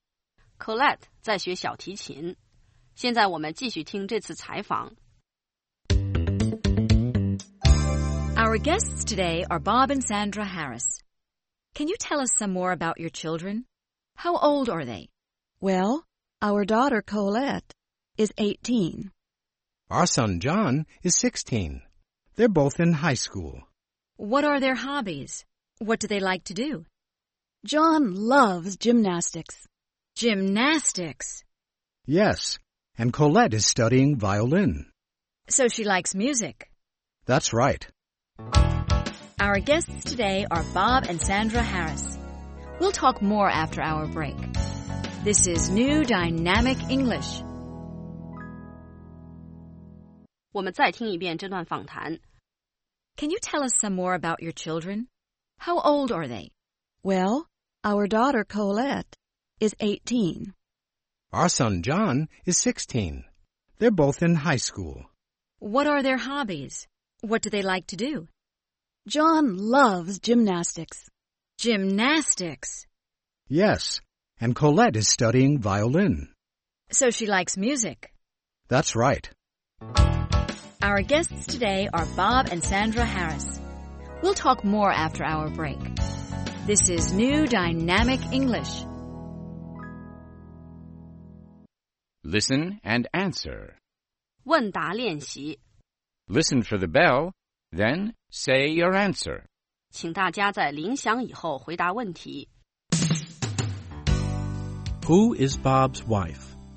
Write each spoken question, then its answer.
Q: Who is Bob's wife?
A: Sandra is Bob's wife.